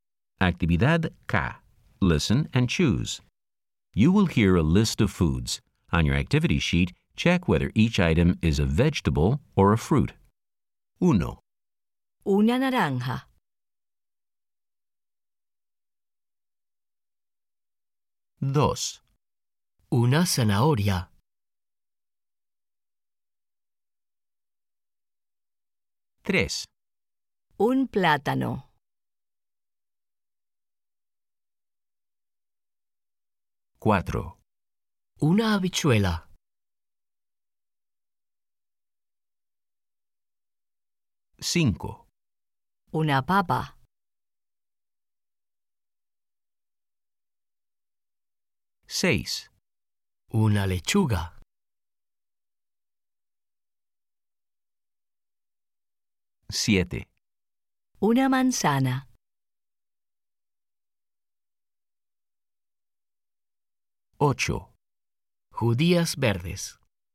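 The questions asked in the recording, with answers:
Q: Una naranja.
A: fruit

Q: Una zanahoria.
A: vegetable

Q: Un plátano.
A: fruit

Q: Una habichuela.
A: vegetable

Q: Una papa.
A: vegetable

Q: Una lechuga.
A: vegetable

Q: Una manzana.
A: fruit

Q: Judías verdes.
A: vegetable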